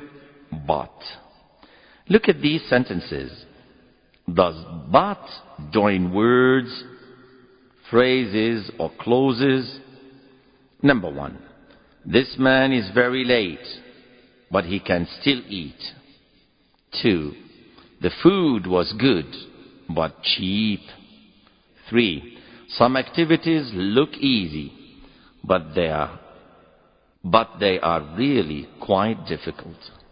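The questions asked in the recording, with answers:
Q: This man is very late, but he can still eat.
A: clauses

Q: The food was good, but cheap.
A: words

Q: Some activities look easy,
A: clauses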